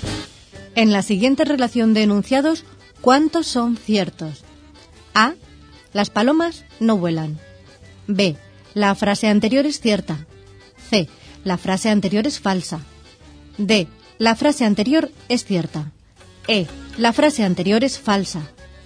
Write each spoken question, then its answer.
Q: En la siguiente relación de enunciados, ¿cuántos son ciertos?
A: Solución. Los 2 enunciados ciertos son el C y el D.